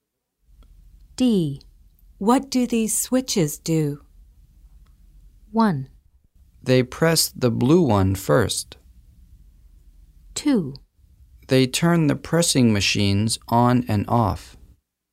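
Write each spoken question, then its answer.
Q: What do these switches do?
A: 2: They turn the pressing machines on and off.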